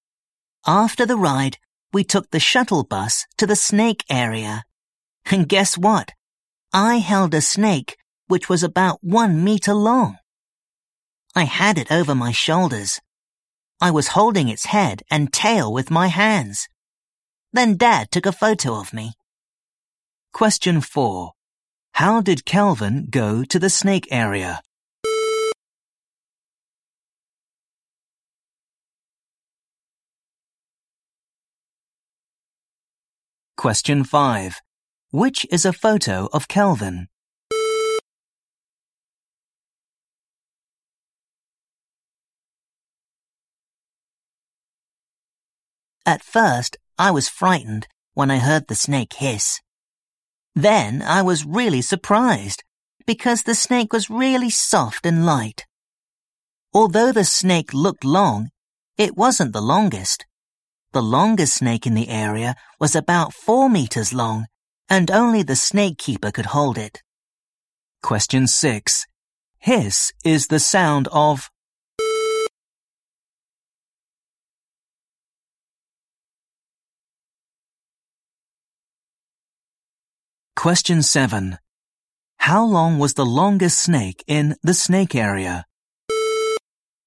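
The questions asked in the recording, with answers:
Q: How did Calvin go to the snake area?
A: By shuttle bus

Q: Hiss is the sound of.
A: A snake

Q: How long was the longest snake in the snake area?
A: About 4 meters long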